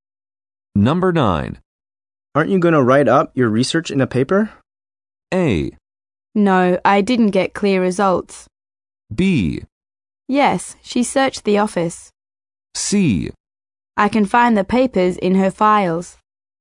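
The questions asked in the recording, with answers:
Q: Aren't you going to write up your research in a paper?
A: A: No, I didn't get clear results.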